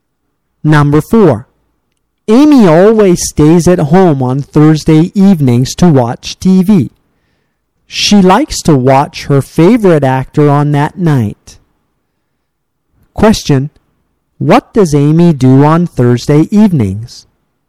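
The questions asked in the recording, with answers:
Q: What does Amy do on Thursday evenings?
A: She stays at home and watches TV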